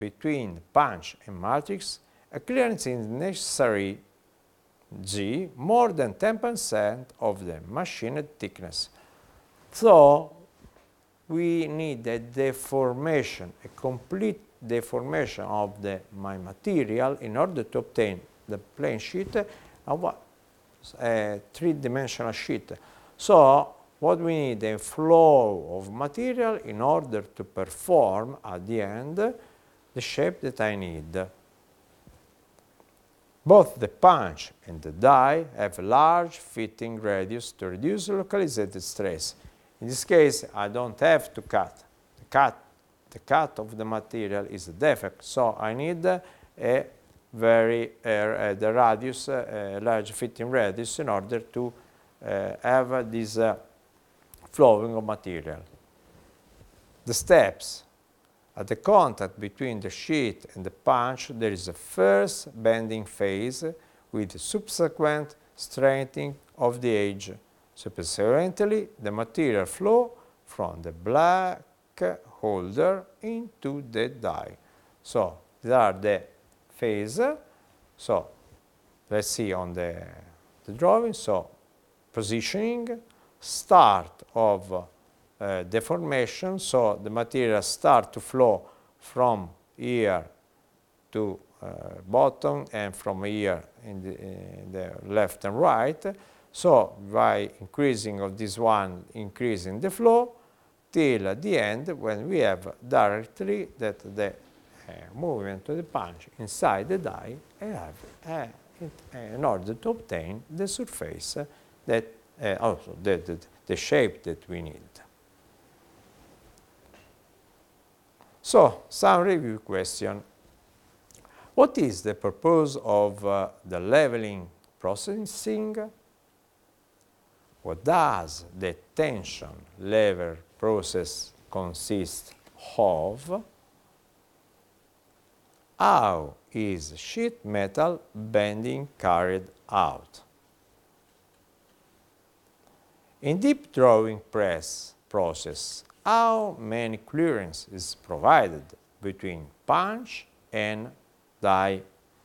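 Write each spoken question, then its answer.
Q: In deep drawing press process, how many clearance is provided between punch and die?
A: More than 10% of the machined thickness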